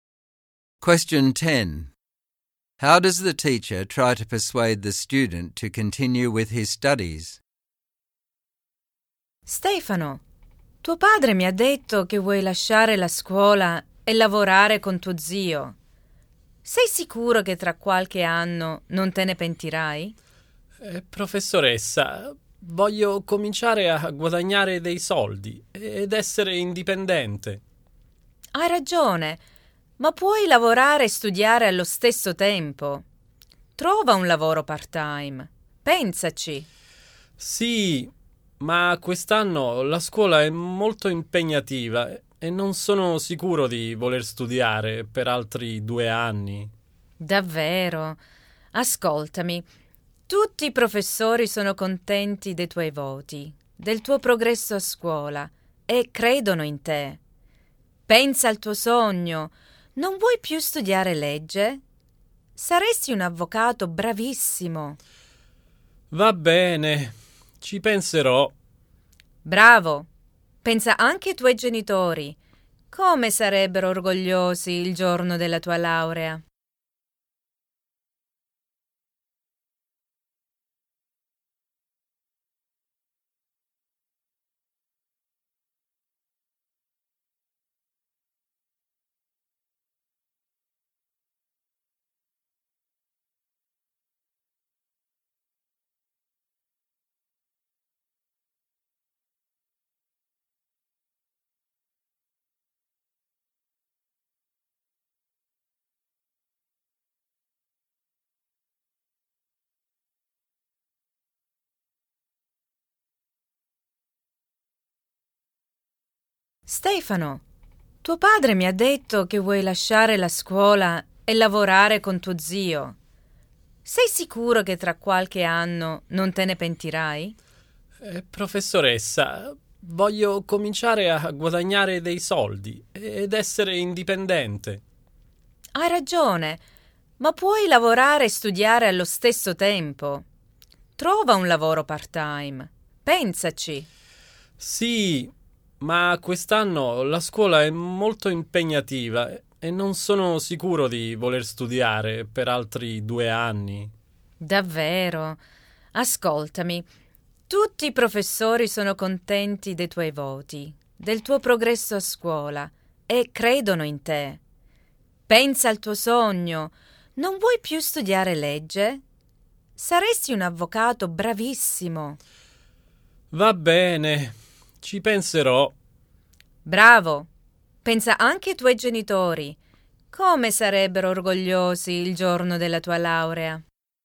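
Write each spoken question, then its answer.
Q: How does the teacher try to persuade the student to continue with his studies?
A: She suggests he work part-time while studying, says the teachers believe in him, reminds him of his dream of studying law and becoming a lawyer, and says how proud his parents would be on his graduation day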